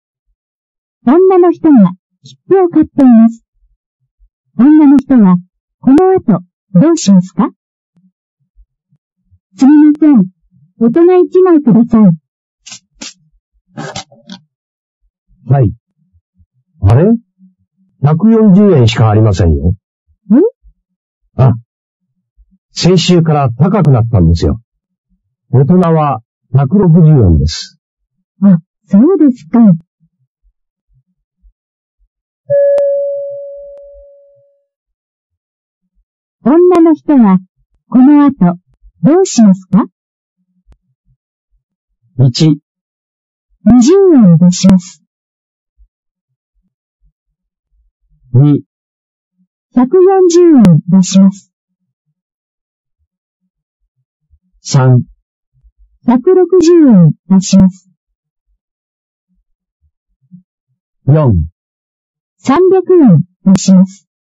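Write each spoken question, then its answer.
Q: 女の人は、この後、どうしますか?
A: 1: 20円出します。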